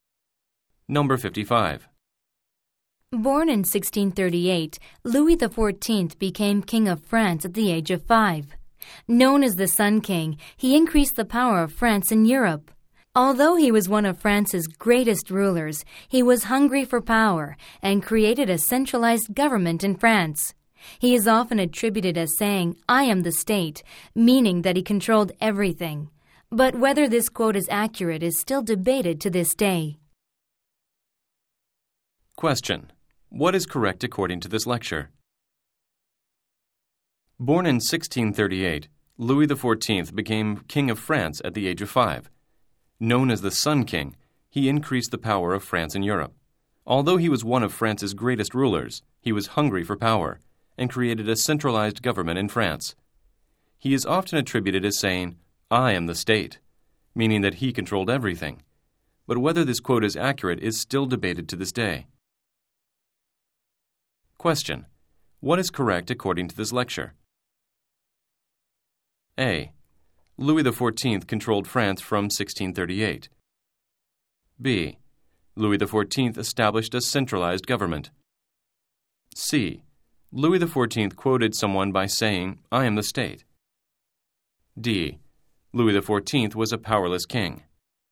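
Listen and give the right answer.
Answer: B: Louis XIV established a centralized government.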